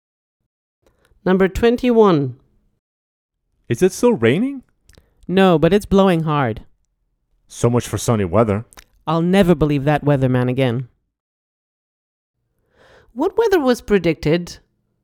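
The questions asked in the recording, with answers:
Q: What weather was predicted?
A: sunny weather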